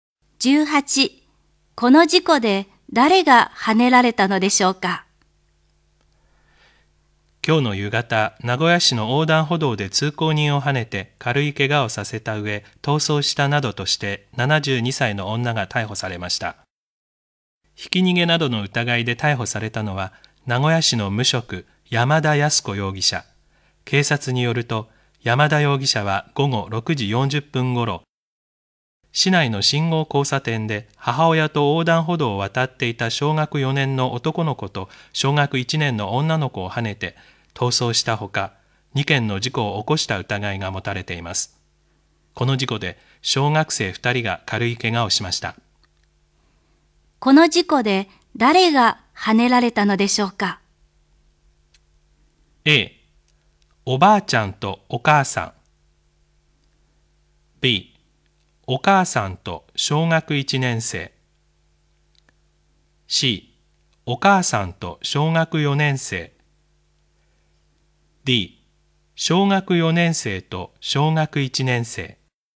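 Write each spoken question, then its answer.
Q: この事故で誰がはねられたのでしょうか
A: D: 小学4年生と小学1年生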